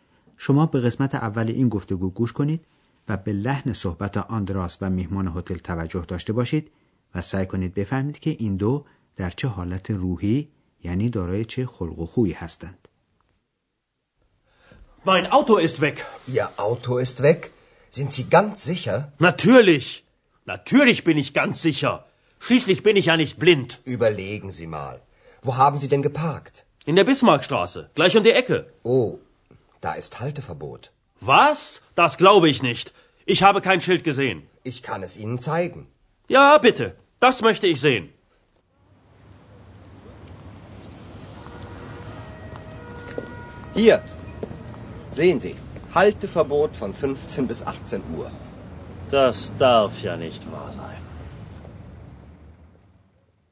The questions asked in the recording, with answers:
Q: سعی کنید بفهمید که این دو در چه حالت روحی یعنی دارای چه خلق و خویی هستند.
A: پس میهمان هتل عصبی و آشفته و حتی میشه گفت عصبانی چون که اتومبیلش رو بردند ولی آندراس با وجود وخامت قضیه آروم میمونه